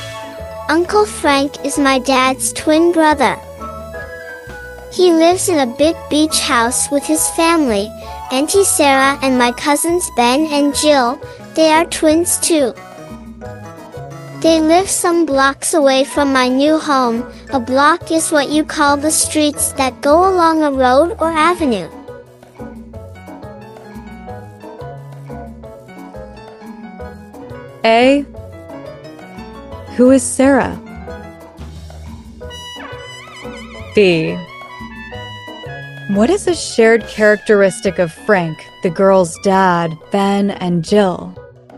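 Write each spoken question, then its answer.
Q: Who is Sarah?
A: Her aunt, Uncle Frank's wife

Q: What is a shared characteristic of Frank, the girl's dad, Ben, and Jill?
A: They are twins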